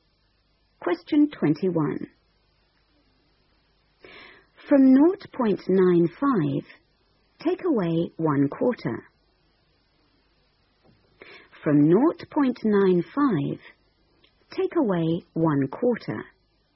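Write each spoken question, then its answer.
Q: From 0.95, take away 1/4.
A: 0.7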